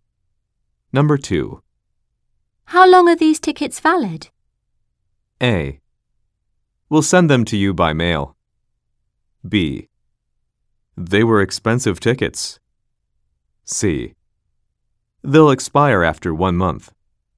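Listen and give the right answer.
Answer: C: They'll expire after 1 month.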